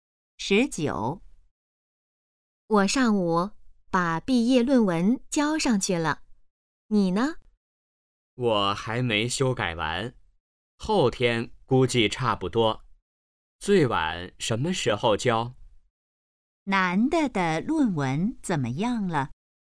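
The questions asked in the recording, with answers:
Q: 男的的论文怎么样了?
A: 还没修改完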